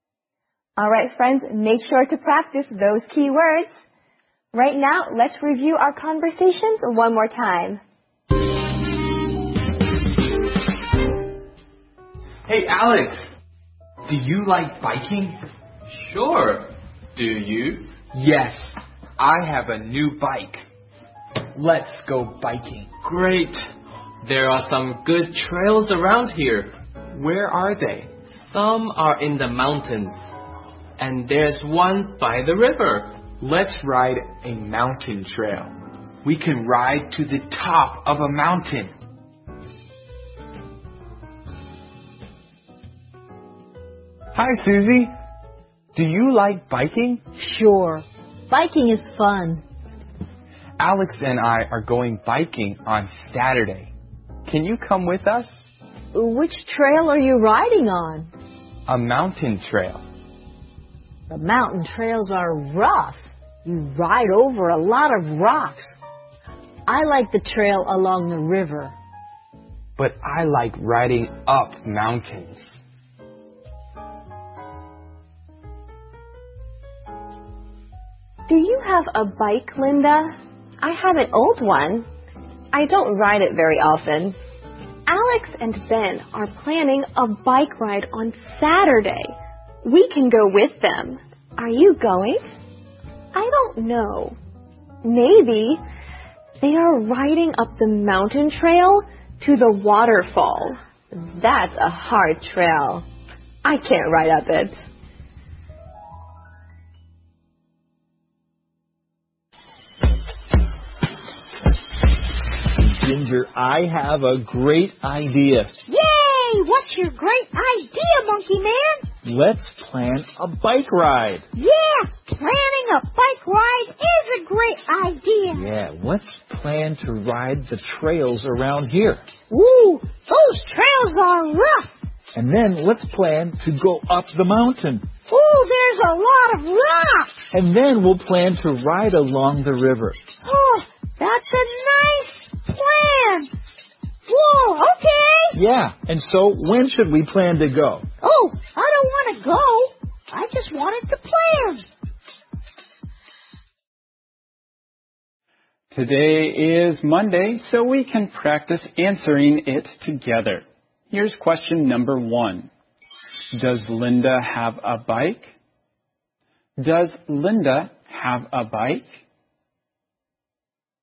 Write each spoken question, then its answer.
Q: Does Linda have a bike? Does Linda have a bike?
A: Yes, she has an old bike.